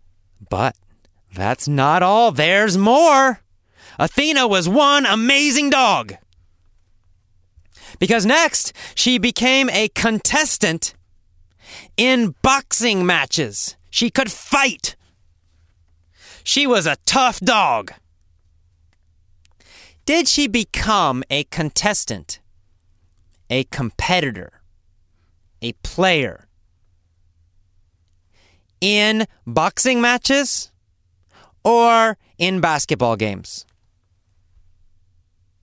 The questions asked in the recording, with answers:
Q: Did she become a contestant, a competitor, a player in boxing matches or in basketball games?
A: Well, in boxing matches. She became a contestant in boxing matches.